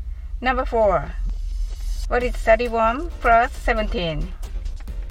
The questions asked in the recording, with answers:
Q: What is 31 plus 17?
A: The answer is 48.